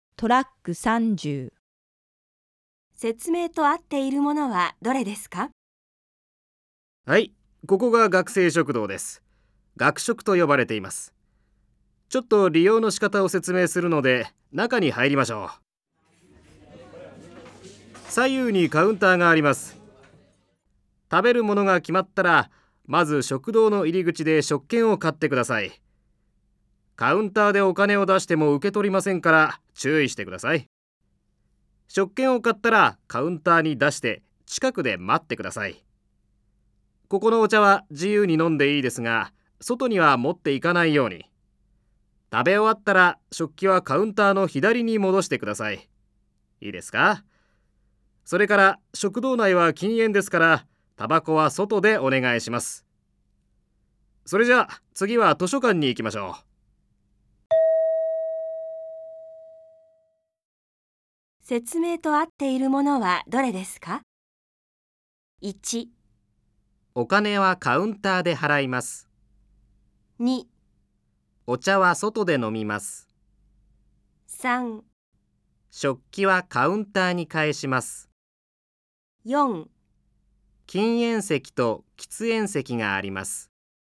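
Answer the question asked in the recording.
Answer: 3: 食器はカウンターに返します。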